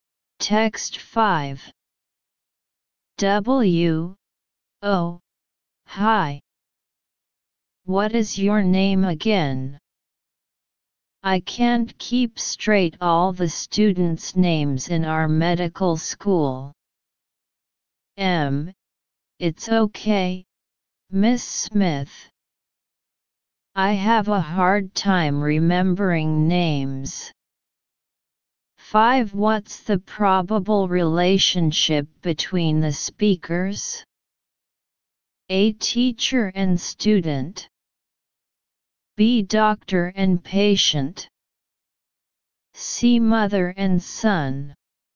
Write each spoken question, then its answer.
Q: What's the probable relationship between the speakers?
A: Answer, A.